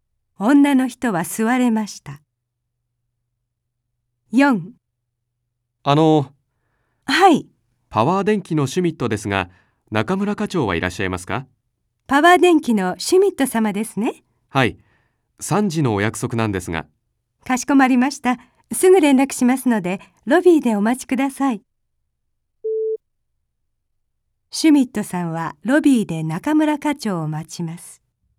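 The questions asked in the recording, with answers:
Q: シュミットさんはロビーで中村課長を待ちます。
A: はい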